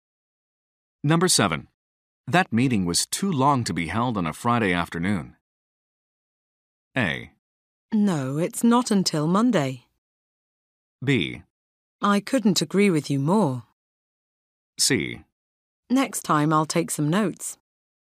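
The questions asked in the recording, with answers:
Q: That meeting was too long to be held on a Friday afternoon.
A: B: I couldn't agree with you more.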